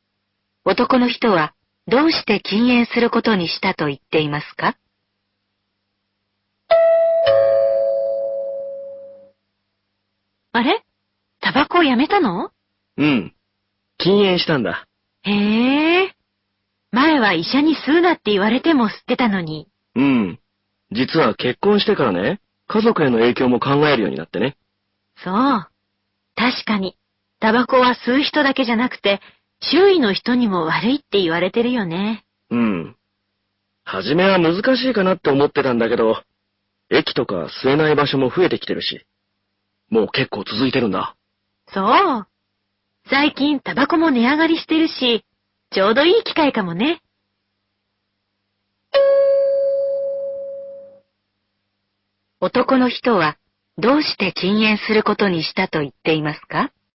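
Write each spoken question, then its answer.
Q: 男の人はどうして禁煙することにしたと言っていますか?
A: 結婚して、家族への影響を考えるようになったから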